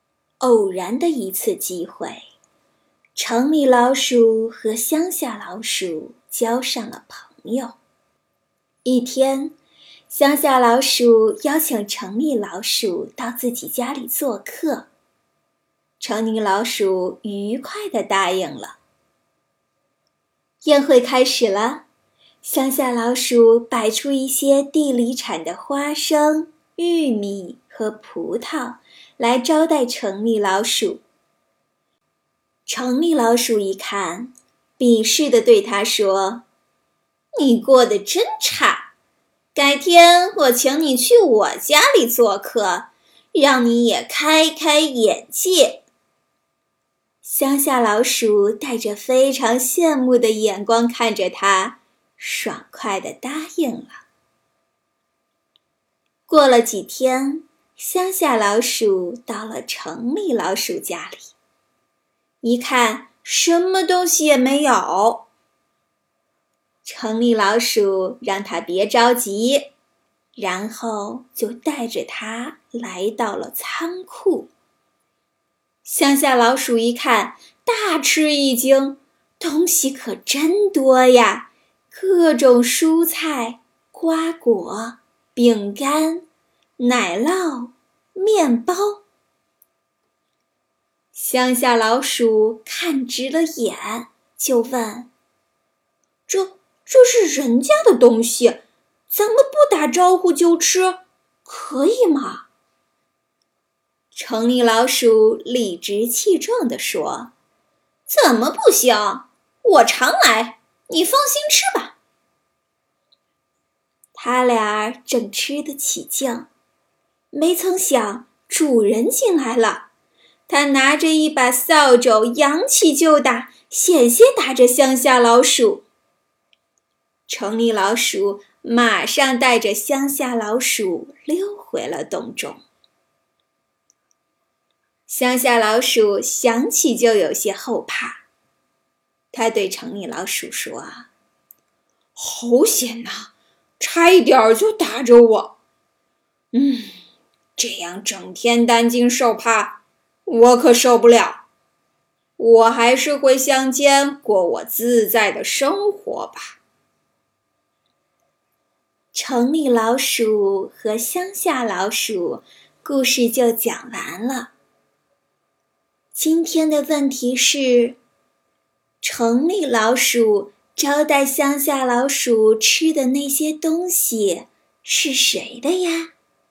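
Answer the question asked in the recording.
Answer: 人家(主人)的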